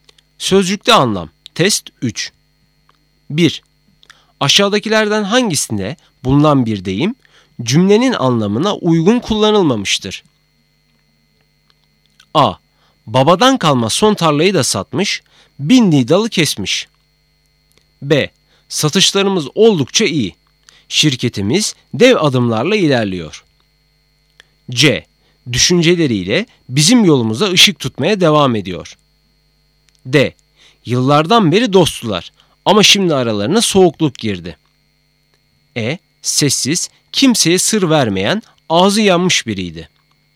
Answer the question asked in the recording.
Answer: Doğru cevap E, sessiz, kimseye sır vermeyen, ağzı yanmış biriydi.